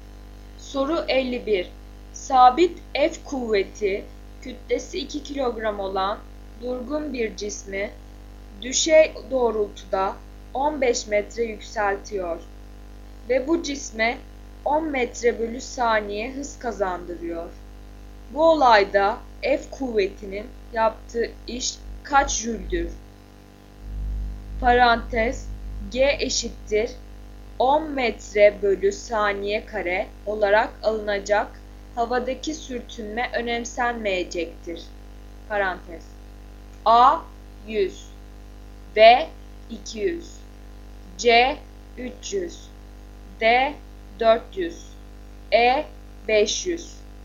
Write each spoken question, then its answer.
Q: Bu olayda F kuvvetinin yaptığı iş kaç jüldür?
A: Doğru yanıt D 400.